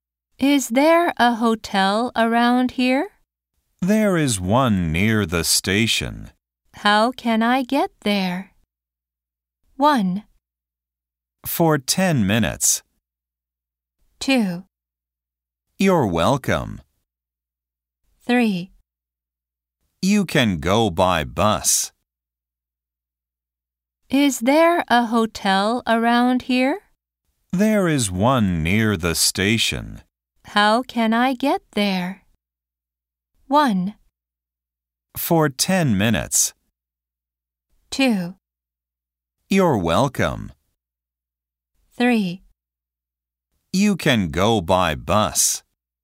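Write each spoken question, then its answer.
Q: How can I get there?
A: 3: You can go by bus.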